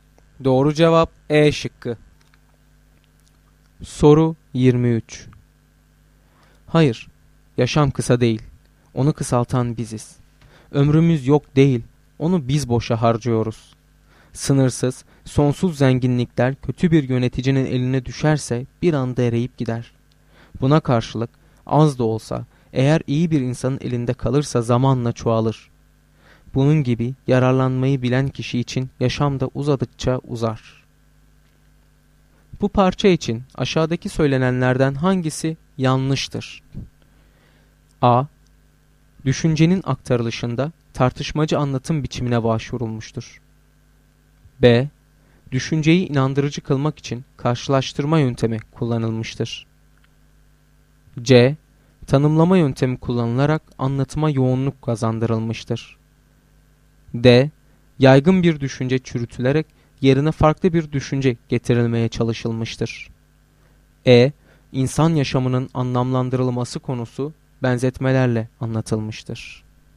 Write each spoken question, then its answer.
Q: Bu parça için aşağıdaki söylenenlerden hangisi yanlıştır?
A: Doğru cevap C şıkkı.